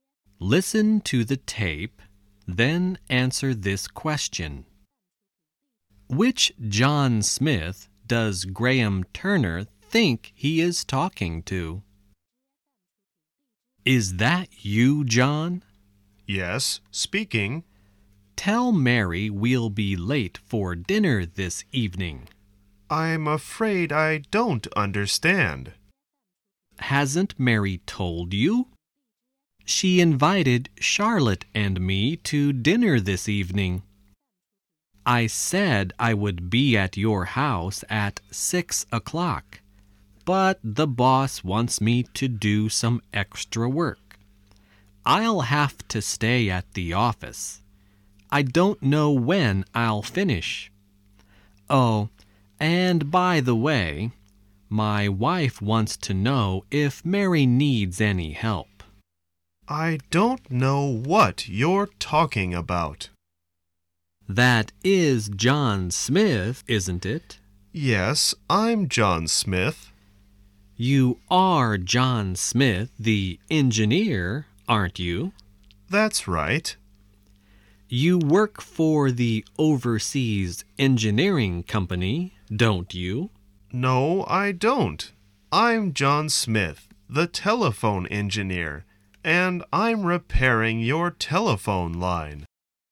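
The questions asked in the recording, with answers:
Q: Which John Smith does Graham Turner think he is talking to?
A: John Smith the engineer who works for the Overseas Engineering Company (Mary's husband)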